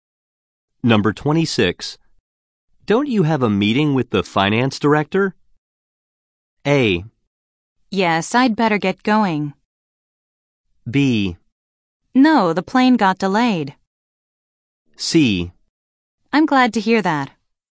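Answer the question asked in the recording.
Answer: A: Yes, I'd better get going.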